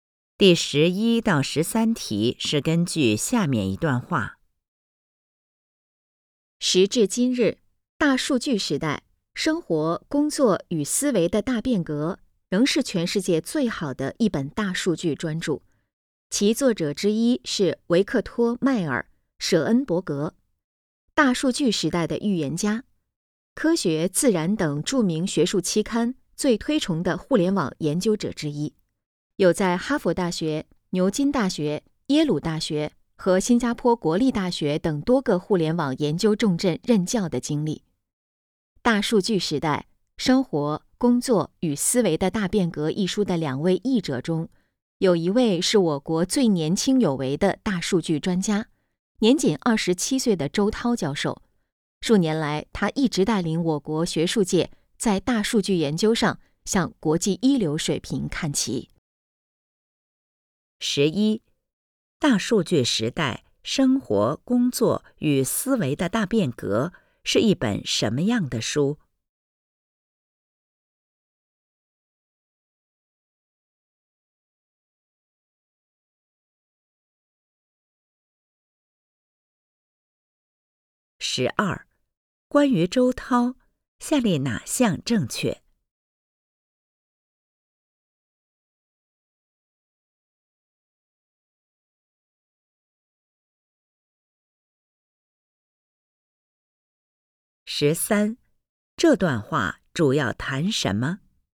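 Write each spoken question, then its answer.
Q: 大数据时代,生活、工作与思维的大变革,是一本什么样的书?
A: 全世界最好的一本大数据专著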